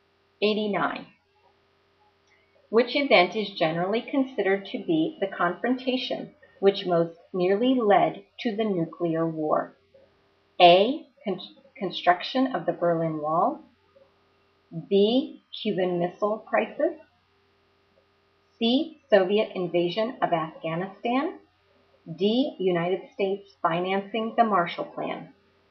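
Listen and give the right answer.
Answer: B: Cuban Missile Crisis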